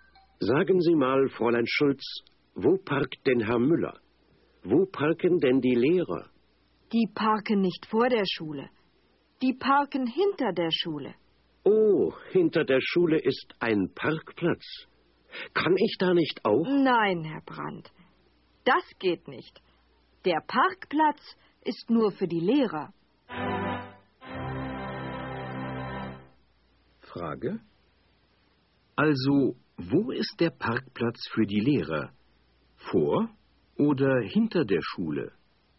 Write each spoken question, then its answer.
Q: Also, wo ist der Parkplatz für die Lehrer? Vor oder hinter der Schule?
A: Er ist hinter der Schule.